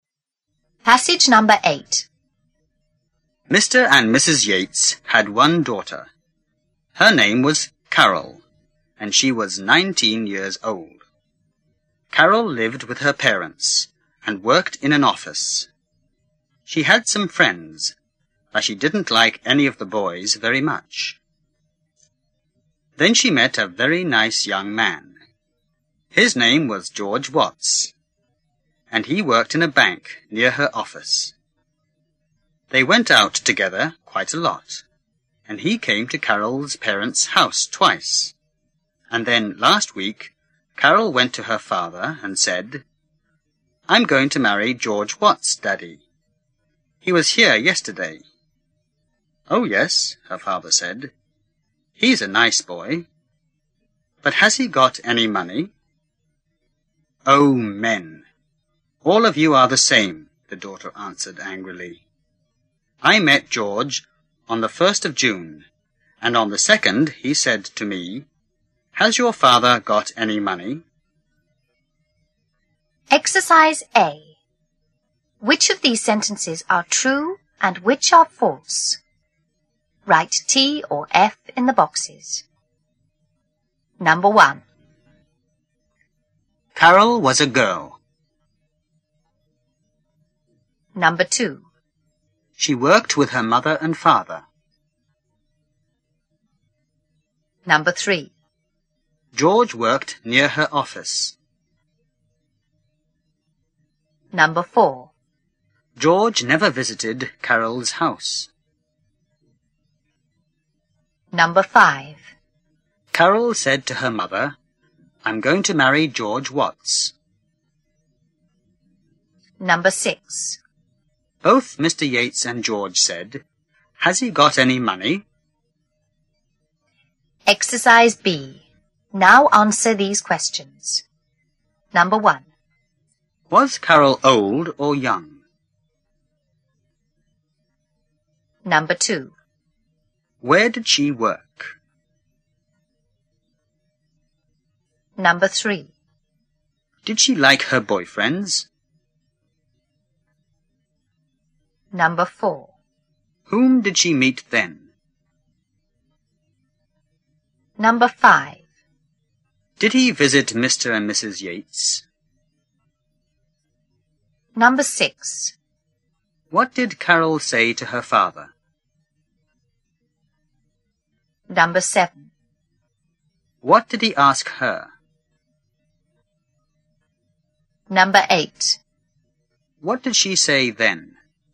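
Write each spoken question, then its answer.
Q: Carol was a girl.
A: True

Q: She worked with her mother and father.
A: False

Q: George worked near her office.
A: True

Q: George never visited Carol's house.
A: False

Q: Carol said to her mother, "I'm going to marry George Watts."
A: False

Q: Was Carol old or young?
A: Young (19 years old)

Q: Where did she work?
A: In an office

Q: Did she like her boyfriends?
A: No, not very much

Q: Whom did she meet then?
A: George Watts, a very nice young man

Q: Did he visit Mr. and Mrs. Yates?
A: Yes, twice

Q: What did Carol say to her father?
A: I'm going to marry George Watts

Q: What did he ask her?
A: Has he got any money?

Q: What did she say then?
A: Men are all the same; George asked if her father had any money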